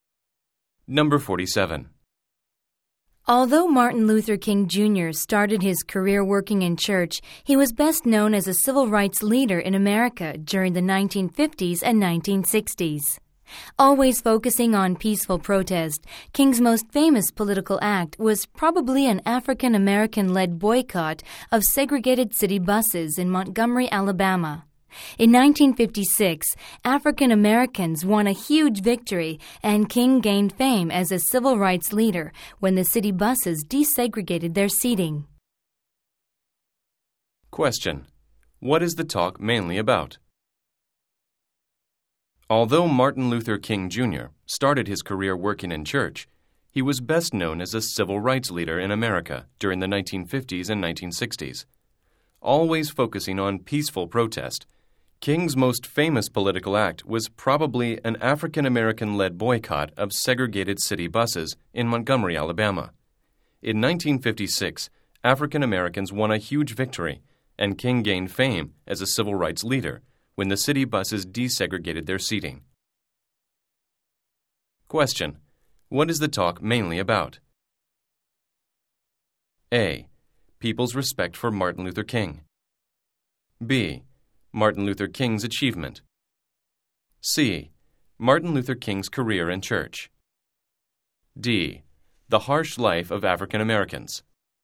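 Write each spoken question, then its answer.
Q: What is the talk mainly about?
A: B: Martin Luther King's achievement.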